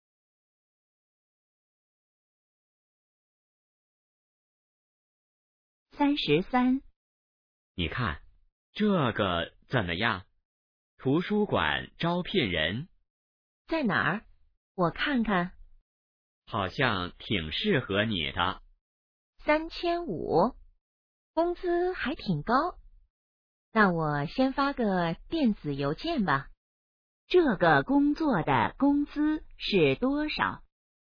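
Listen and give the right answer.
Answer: 3500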